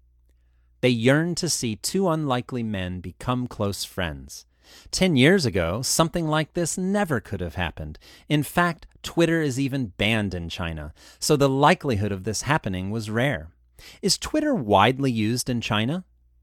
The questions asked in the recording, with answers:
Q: Is Twitter widely used in China?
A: No, Twitter is banned in China.